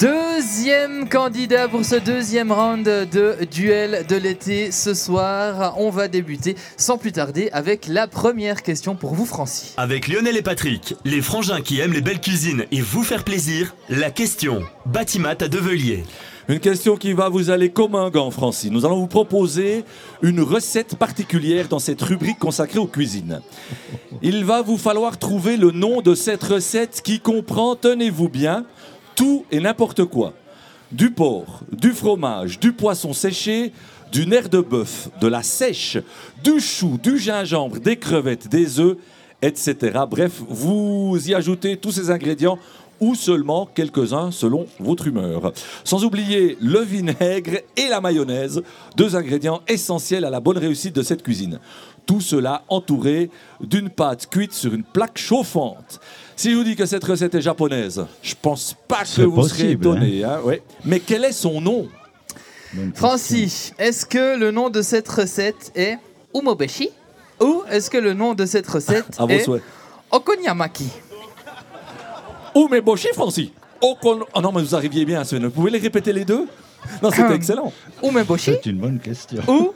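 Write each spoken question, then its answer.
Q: Mais quel est son nom ?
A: B: Okonomiyaki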